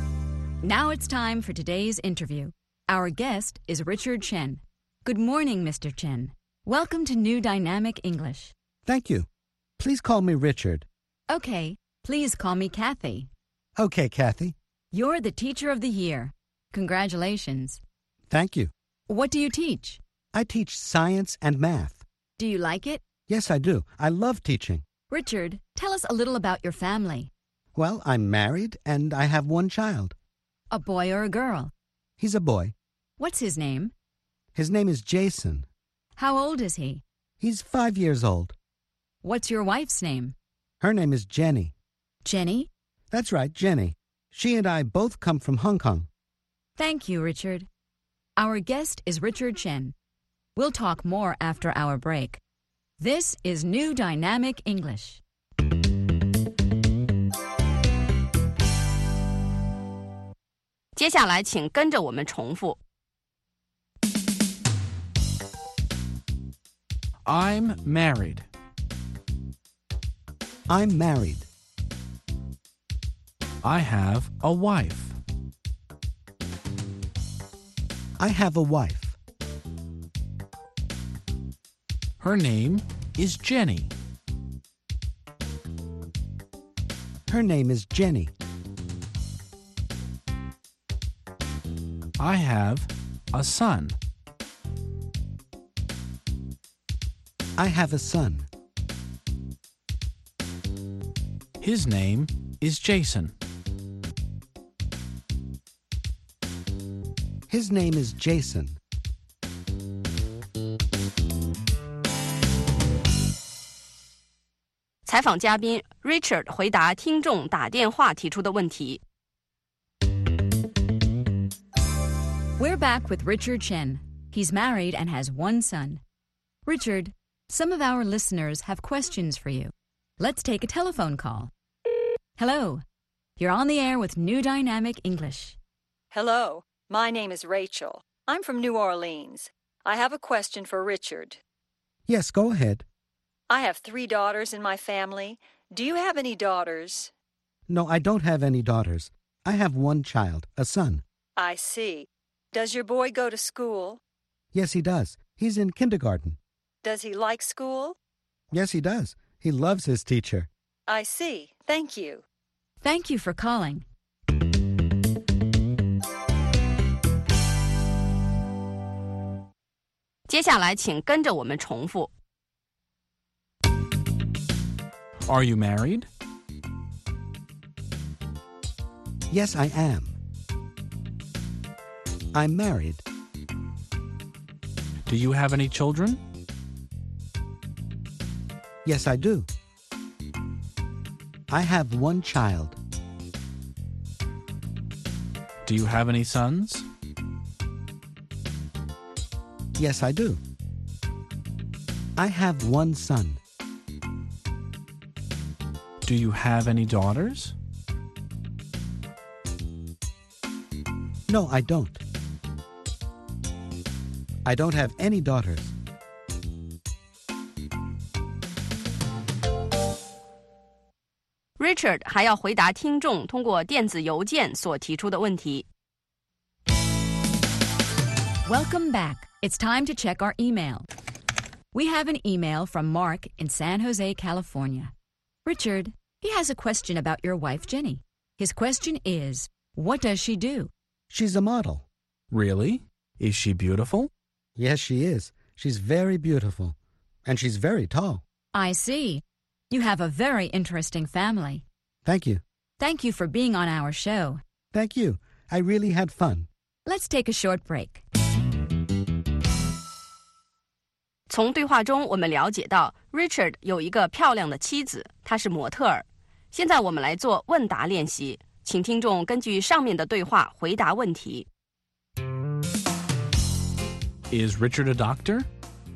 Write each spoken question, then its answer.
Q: Is Richard a doctor?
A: No, he isn't. He's a teacher.